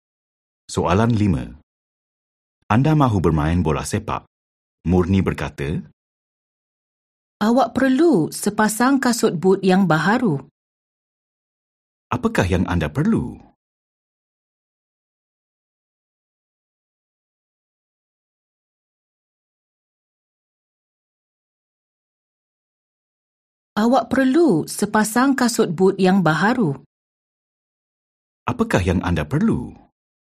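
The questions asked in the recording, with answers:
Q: Apakah yang anda perlu?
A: sepasang kasut but yang baharu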